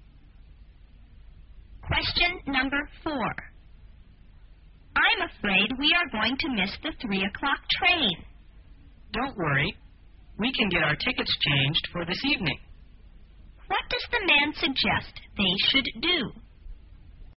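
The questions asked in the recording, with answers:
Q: What does the man suggest they should do?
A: Get their tickets changed for an evening train.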